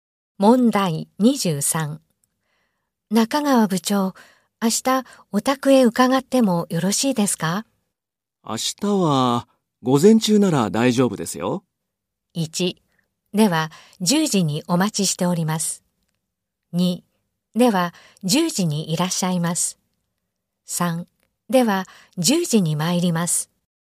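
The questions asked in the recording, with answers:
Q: 中川部長、明日お宅へ伺ってもよろしいですか?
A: 1: では10時に参ります。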